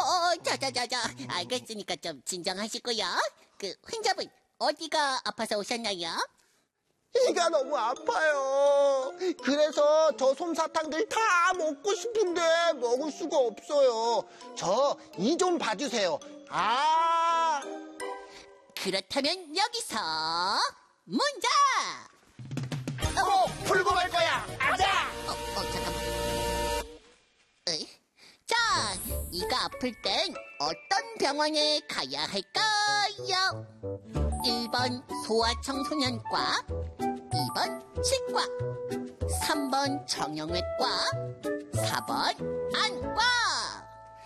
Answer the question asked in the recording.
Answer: 정답! 2번 치과!